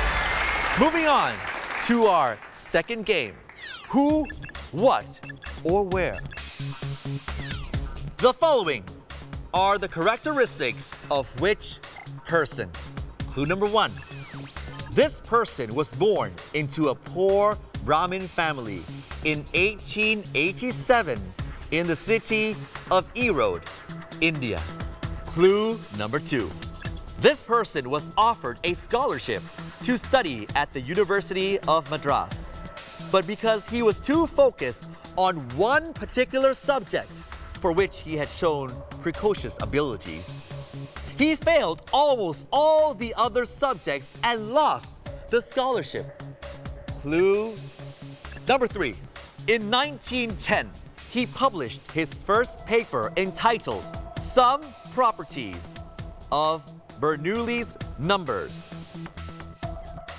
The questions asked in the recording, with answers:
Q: The following are the characteristics of whichperson.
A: Ramanujan is a very intelligent Indian mathematician